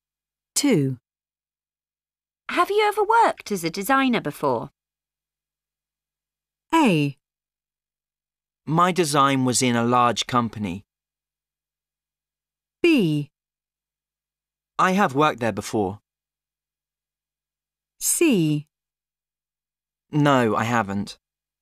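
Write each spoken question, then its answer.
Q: Have you ever worked as a designer before?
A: C: No, I haven't.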